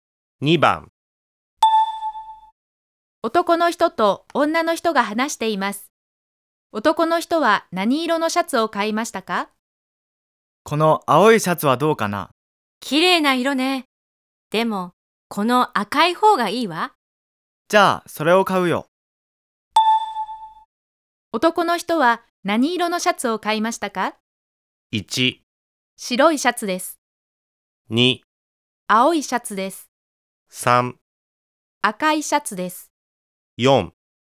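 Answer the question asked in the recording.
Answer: 3: 赤いシャツです。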